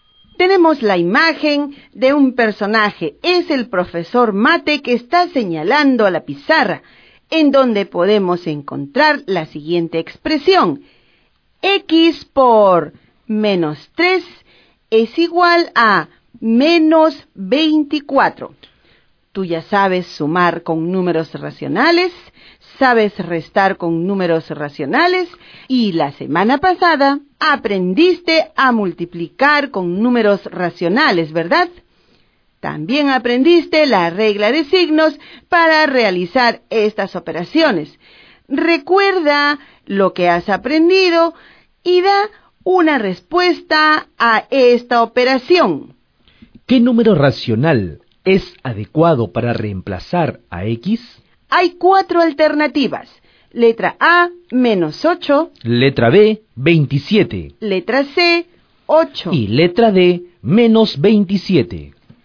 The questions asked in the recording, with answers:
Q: ¿Qué número racional es adecuado para reemplazar a X?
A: Por lo tanto, en x por menos 3 igual menos 24, el valor de x es igual a 8.